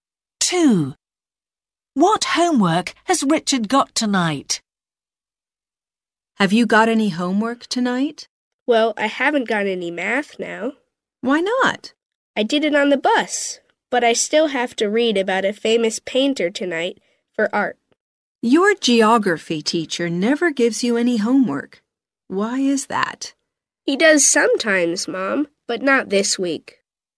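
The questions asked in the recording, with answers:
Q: What homework has Richard got tonight?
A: art (reading about a famous painter)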